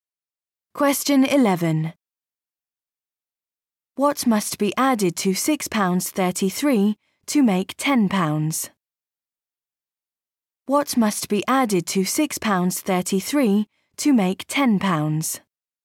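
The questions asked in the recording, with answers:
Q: What must be added to £6.33 to make £10?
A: £3.67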